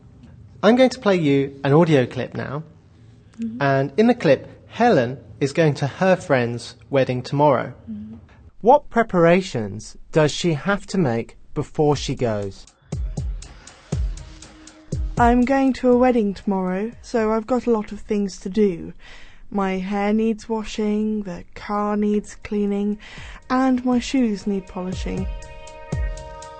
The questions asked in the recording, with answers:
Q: What preparations does she have to make before she goes?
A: First, her hair needs washing.